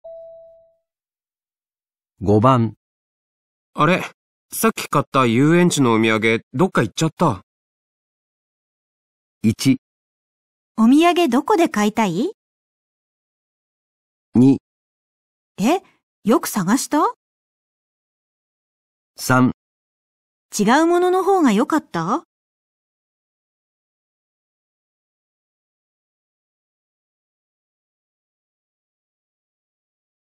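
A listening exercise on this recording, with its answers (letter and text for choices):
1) 男:あれ?さっき買った遊園地のお土産、どっか行っちゃった。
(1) お土産どこで買いたい?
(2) え?よく探した?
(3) 違うものの方がよかった?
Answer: (2) え?よく探した?

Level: 【N2 第2回】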